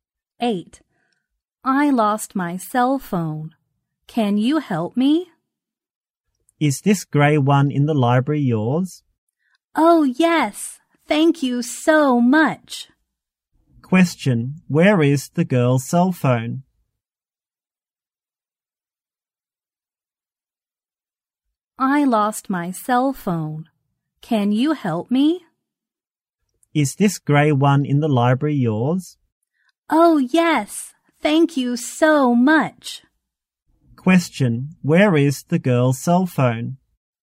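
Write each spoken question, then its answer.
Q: Where is the girl's cell phone?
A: In the library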